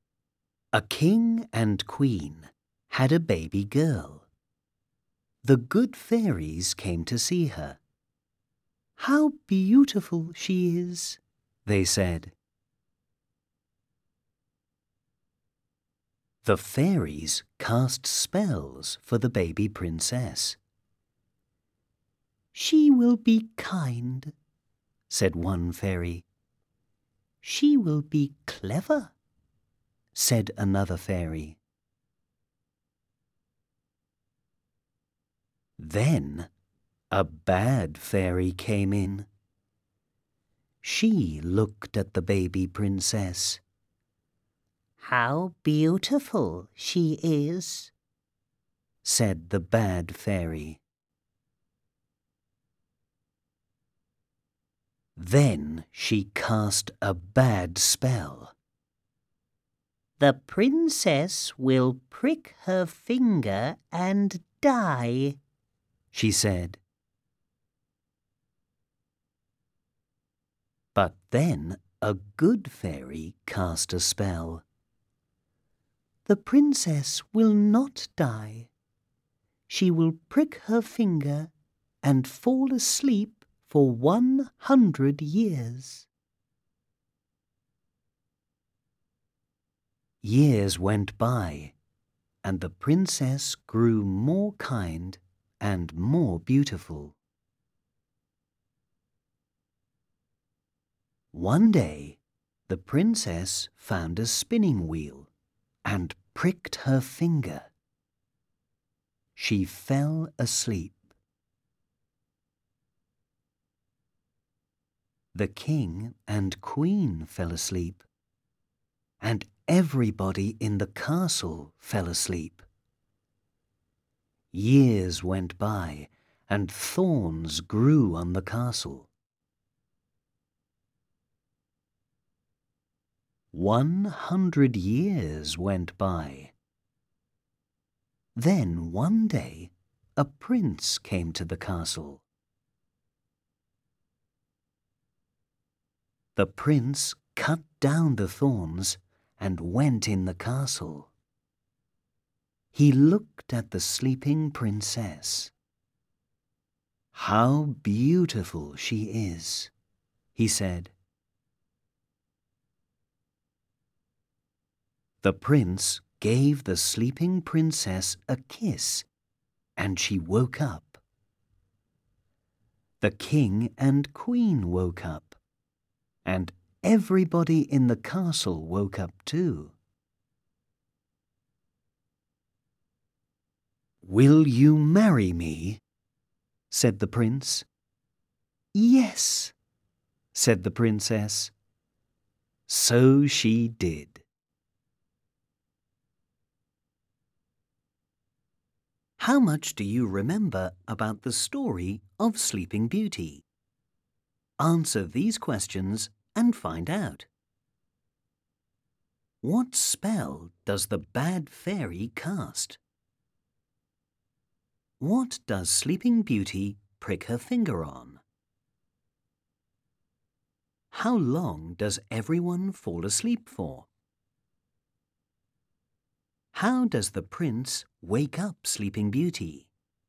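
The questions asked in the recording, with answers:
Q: What spell does the bad fairy cast?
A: The princess will prick her finger and die

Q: What does Sleeping Beauty prick her finger on?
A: A spinning wheel

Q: How long does everyone fall asleep for?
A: 100 years

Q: How does the prince wake up Sleeping Beauty?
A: He gives her a kiss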